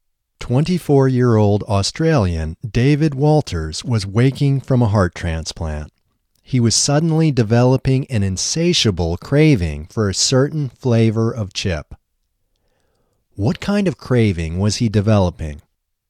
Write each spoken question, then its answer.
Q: What kind of craving was he developing?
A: He was developing an insatiable craving for a certain flavor of chip.